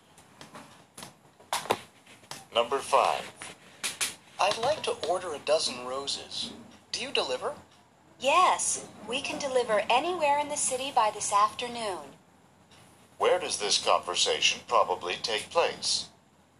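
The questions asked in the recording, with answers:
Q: Where does this conversation probably take place?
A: At a flower shop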